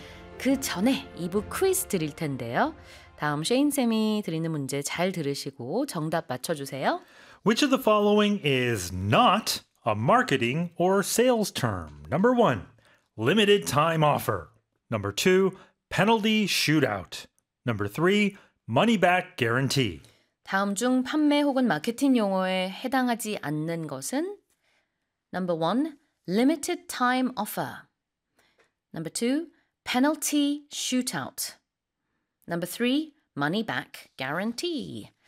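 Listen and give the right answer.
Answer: Number two: penalty shootout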